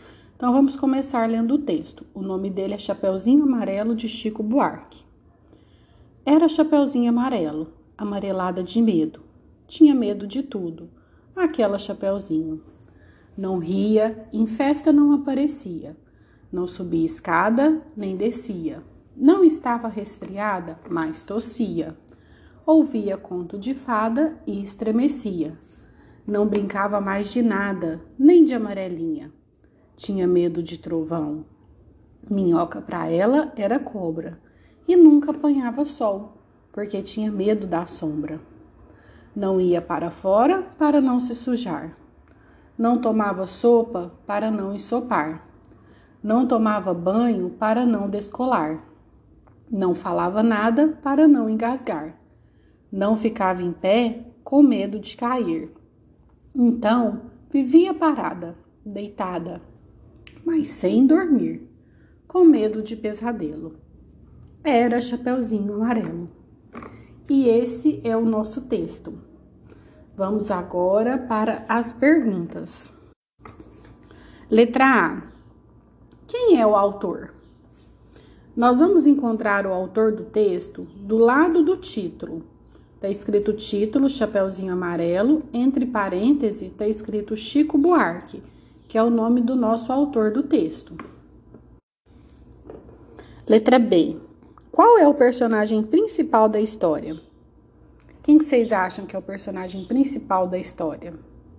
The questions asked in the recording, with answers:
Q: Qual é o personagem principal da história?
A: É a Chapeuzinho Amarelo, né?